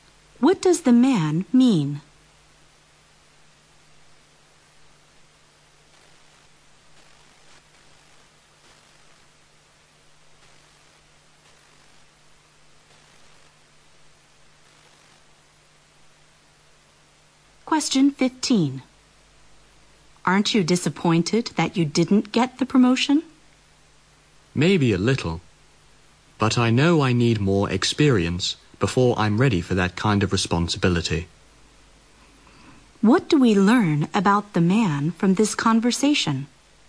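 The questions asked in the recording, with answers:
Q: What do we learn about the man from this conversation?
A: He knows he isn't ready for the promotion yet and needs more experience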